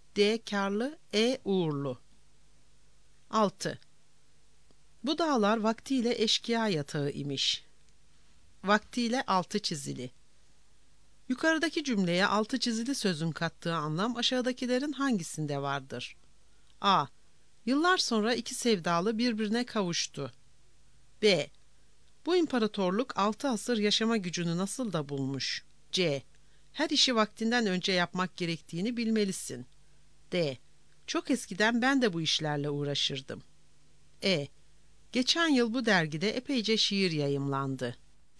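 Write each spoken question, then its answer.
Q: Yukarıdaki cümleye altı çizili sözün kattığı anlam aşağıdakilerin hangisinde vardır?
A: D: Çok eskiden ben de bu işlerle uğraşırdım.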